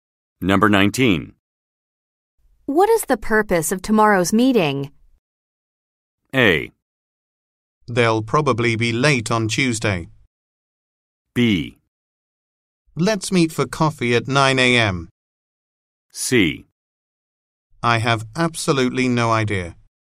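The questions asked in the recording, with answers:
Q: What is the purpose of tomorrow's meeting?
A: C: I have absolutely no idea.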